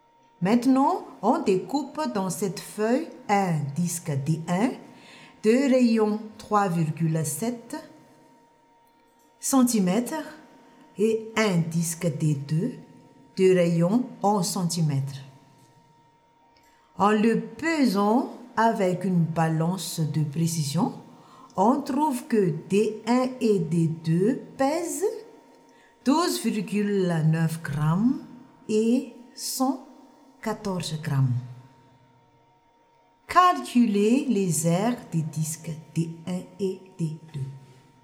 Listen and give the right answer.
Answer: 1 cm carré fois 12,9 divisé par 0,3 est égal à 43 cm carré.